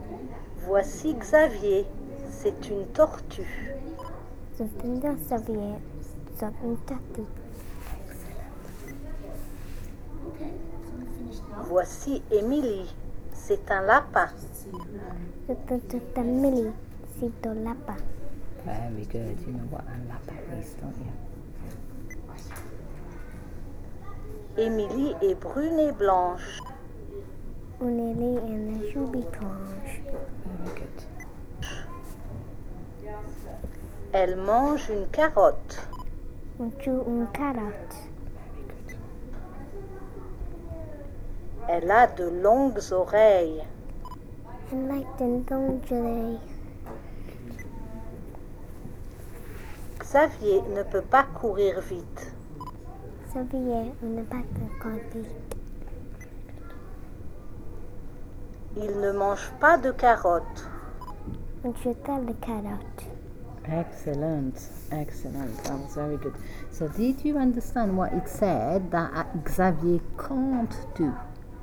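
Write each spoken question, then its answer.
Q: So did you understand what it said that Xavier can't do?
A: He can't run fast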